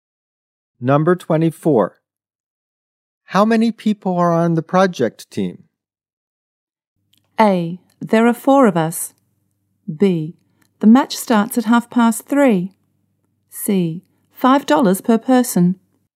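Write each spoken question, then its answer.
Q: How many people are on the project team?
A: A: There are four of us.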